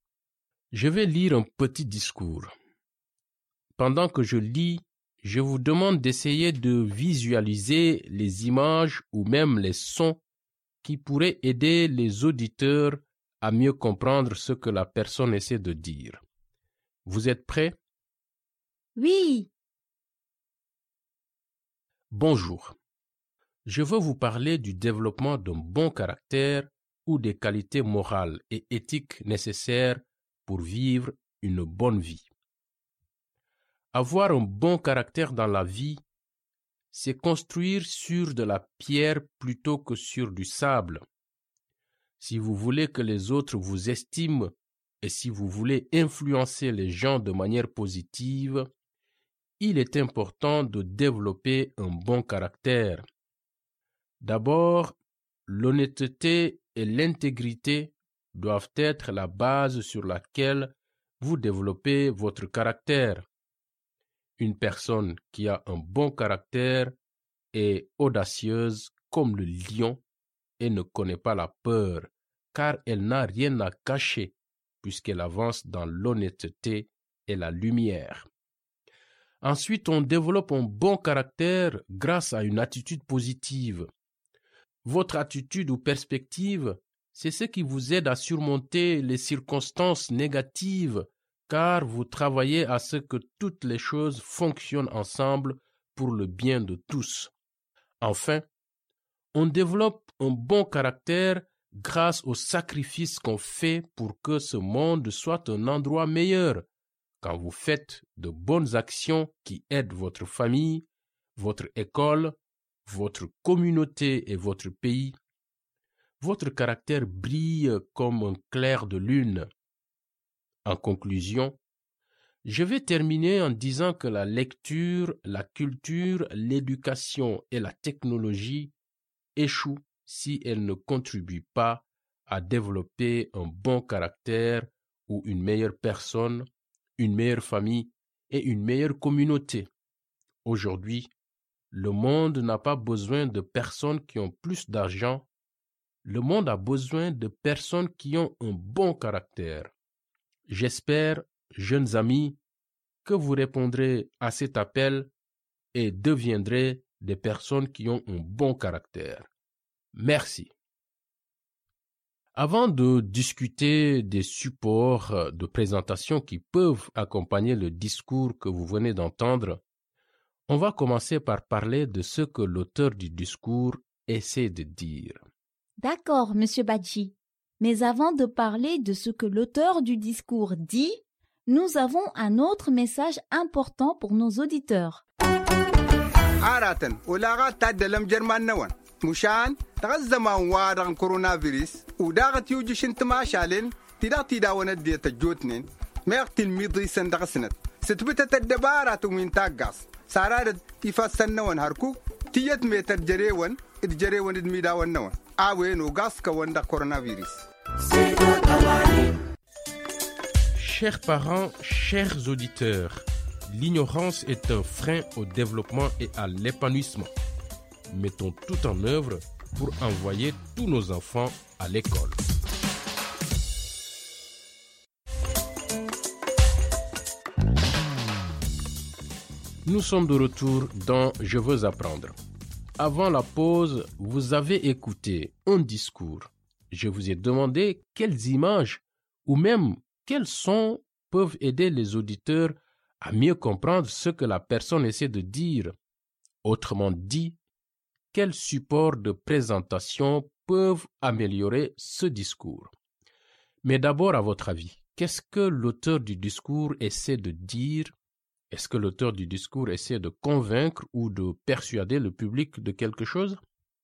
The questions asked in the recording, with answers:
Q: Est-ce que l'auteur du discours essaie de convaincre ou de persuader le public de quelque chose?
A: Oui, l'auteur du discours essaie de convaincre les auditeurs de développer un bon caractère.